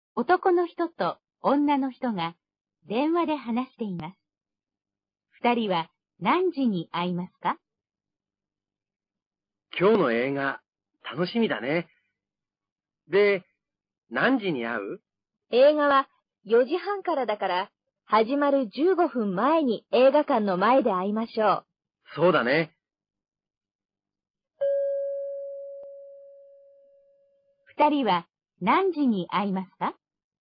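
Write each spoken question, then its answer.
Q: 二人は何時に会いますか?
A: 4時15分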